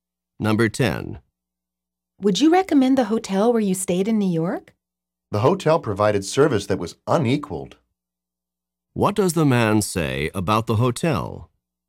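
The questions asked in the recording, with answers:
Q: What does the man say about the hotel?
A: The hotel's service was excellent, better than any other.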